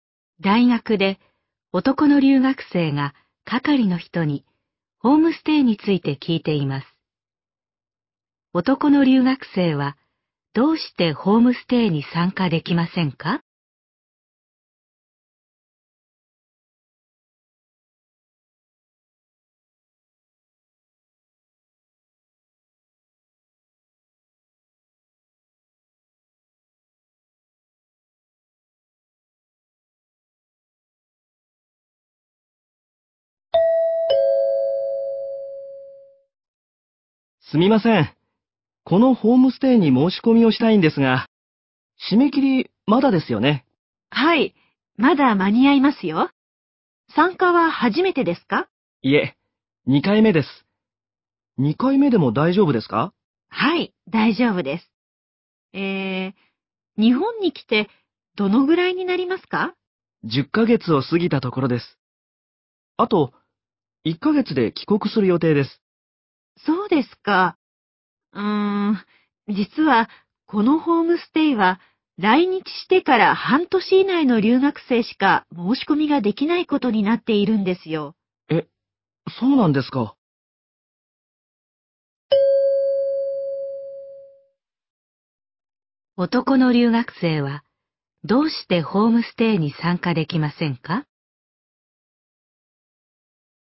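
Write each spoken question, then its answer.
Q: 男の留学生はどうしてホームステイに参加できませんか?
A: 来日してから半年以上たっているから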